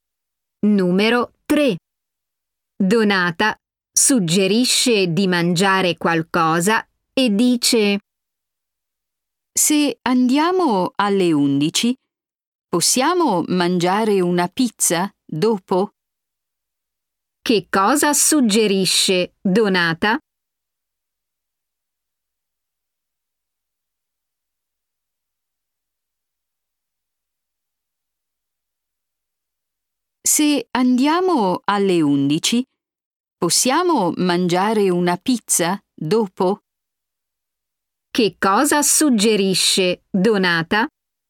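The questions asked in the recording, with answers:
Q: Che cosa suggerisce Donata?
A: mangiare una pizza dopo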